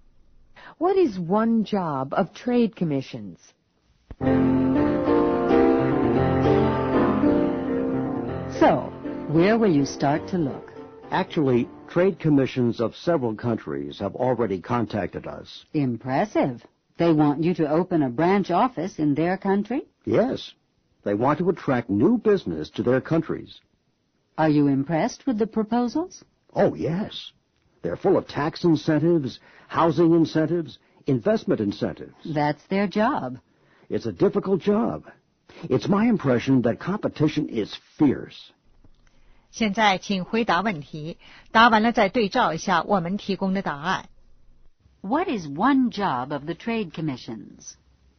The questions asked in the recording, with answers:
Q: What is one job of the trade commissions?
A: To attract new business.